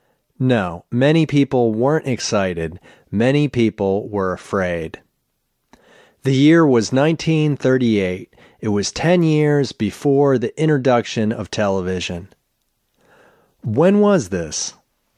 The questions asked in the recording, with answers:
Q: When was this?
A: The year was 1938.